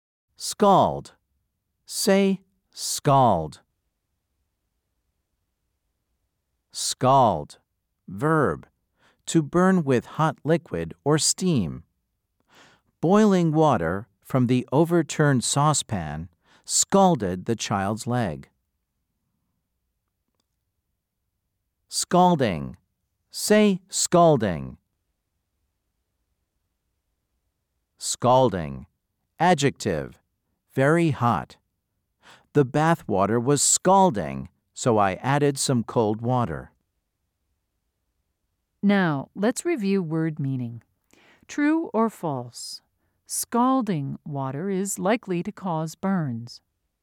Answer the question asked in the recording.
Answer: If you said true, you are correct.